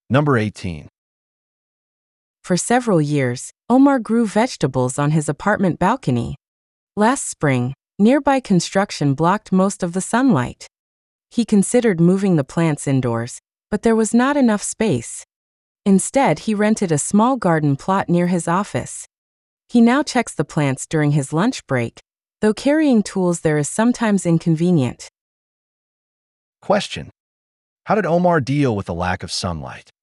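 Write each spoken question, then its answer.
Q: How did Omar deal with the lack of sunlight?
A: He rented a small garden plot near his office.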